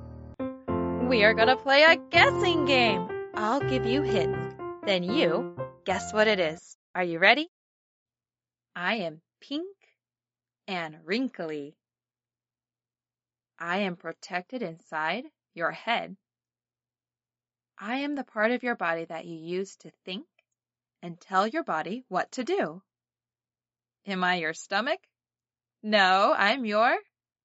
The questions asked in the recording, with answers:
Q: I am the part of your body that you use to think and tell your body what to do.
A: a brain.